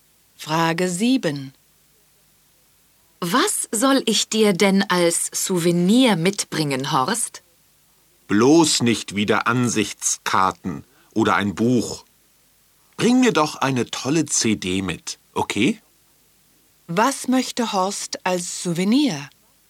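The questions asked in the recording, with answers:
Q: Was möchte Horst als Souvenir?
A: Eine CD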